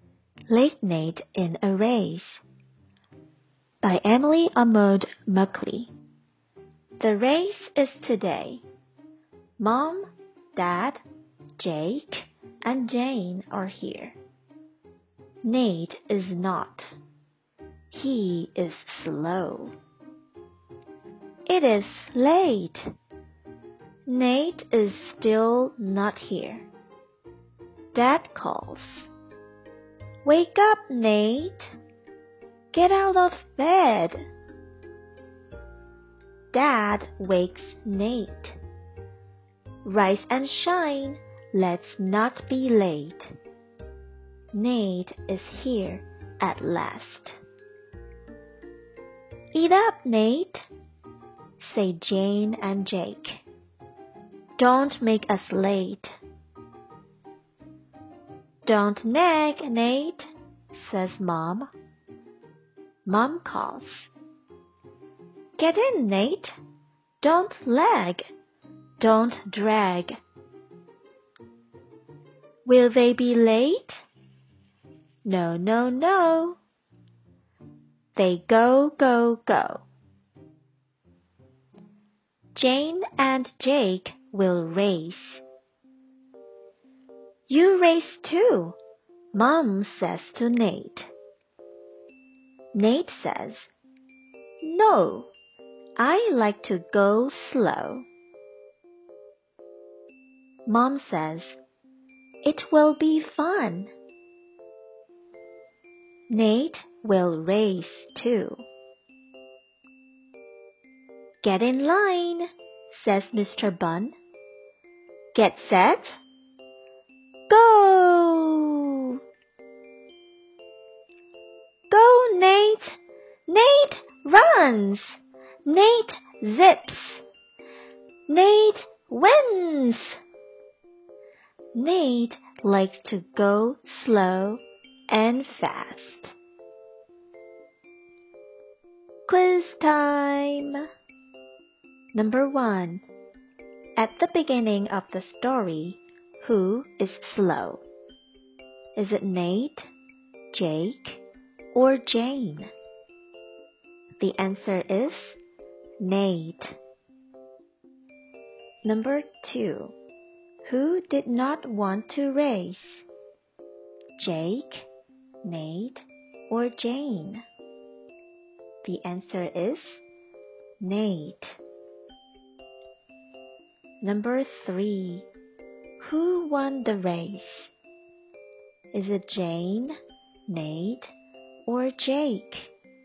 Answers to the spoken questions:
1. The answer is Nate.
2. The answer is Nate.
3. That's right. The answer is Nate.